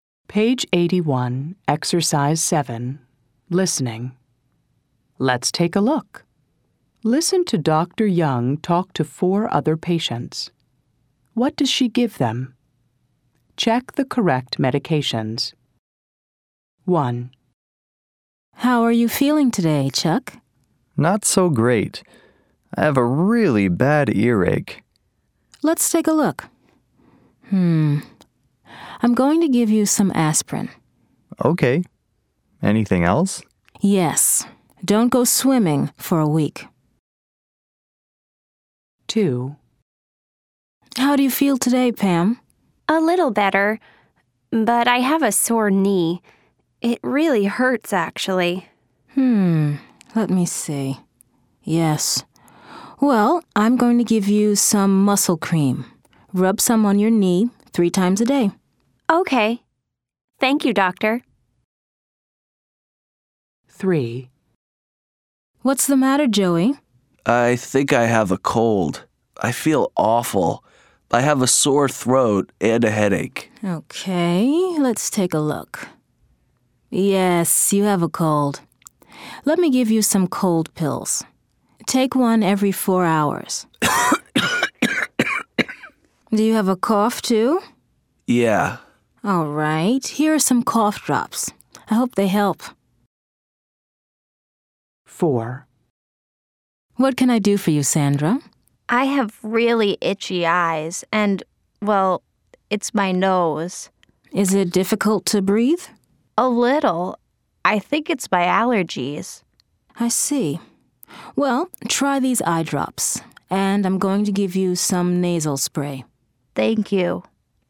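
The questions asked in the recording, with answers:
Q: What does she give them?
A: Chuck: aspirin

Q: What does she give them?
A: Pam: muscle cream

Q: What does she give them?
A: Joey: cold pills and cough drops

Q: What does she give them?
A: Sandra: eye drops and nasal spray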